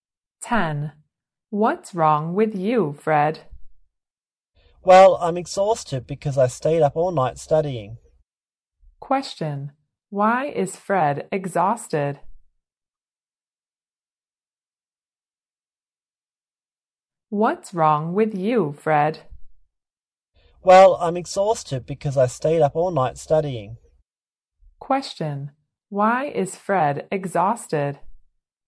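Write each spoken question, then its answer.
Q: Why is Fred exhausted?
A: He stayed up all night studying.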